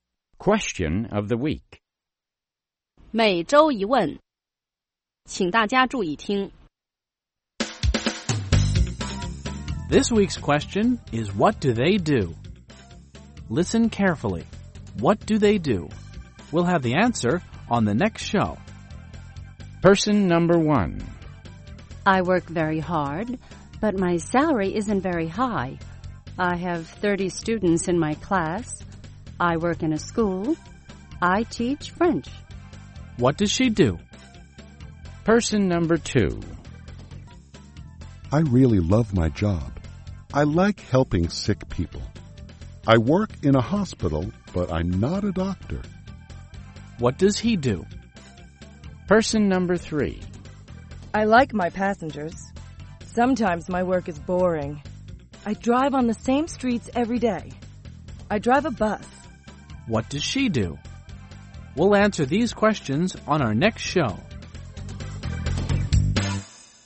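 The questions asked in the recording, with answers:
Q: What does she do?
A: She's a (French) teacher.

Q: What does he do?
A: He's a nurse.

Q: What does she do?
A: She's a bus driver.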